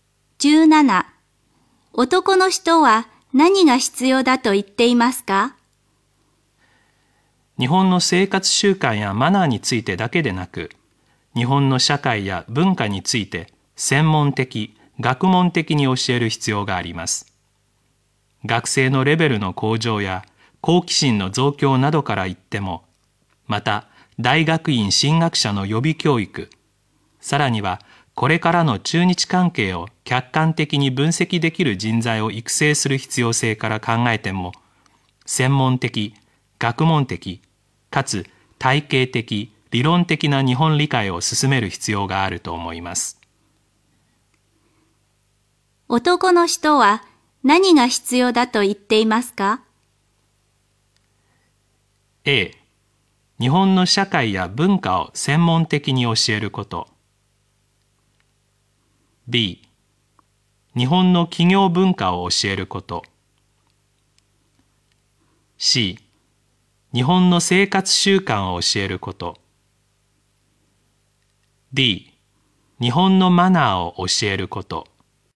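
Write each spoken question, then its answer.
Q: 男の人は何が必要だと言っていますか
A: A: 日本の社会や文化を専門的に教えること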